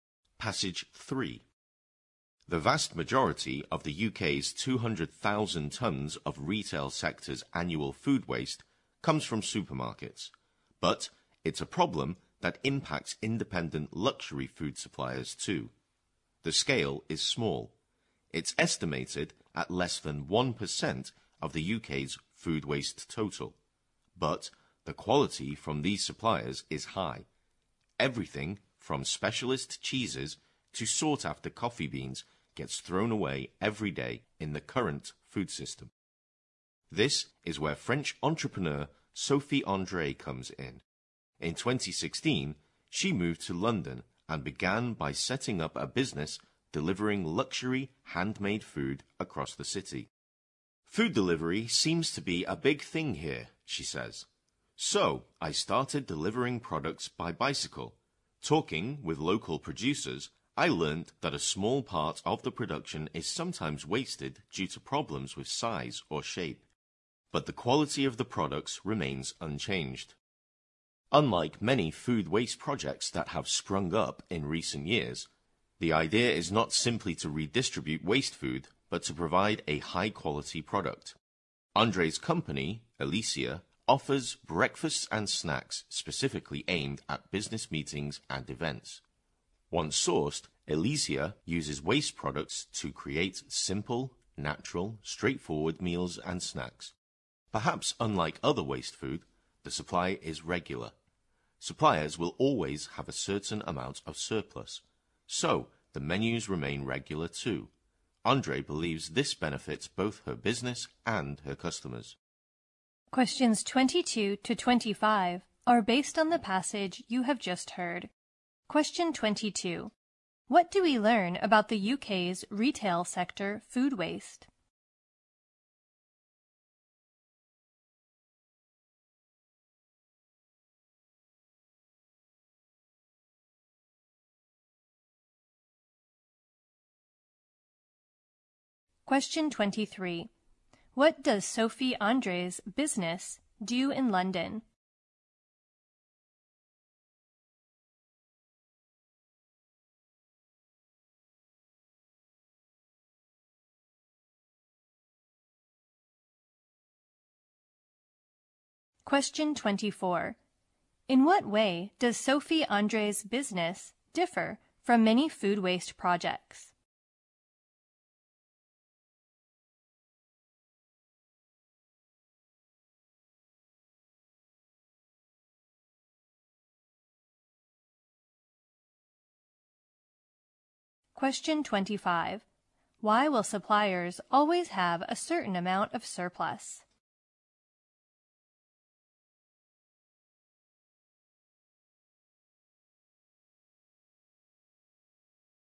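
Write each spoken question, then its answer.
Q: What do we learn about the UK's retail sector food waste?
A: Most of it comes from supermarkets

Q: What does Sophie André's business do in London?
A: Delivers luxury handmade food / breakfasts and snacks for business meetings made from waste products

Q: In what way does Sophie André's business differ from many food waste projects?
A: It provides a high-quality product rather than simply redistributing waste food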